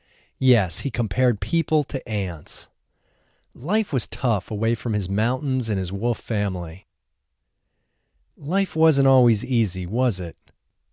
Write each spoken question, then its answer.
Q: Life wasn't always easy, was it?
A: No, life wasn't always easy.